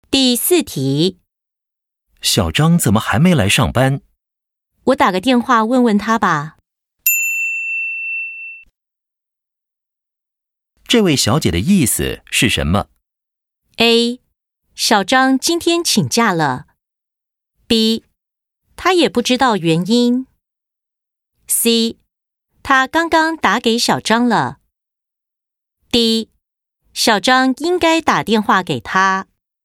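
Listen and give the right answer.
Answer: B: 他也不知道原因。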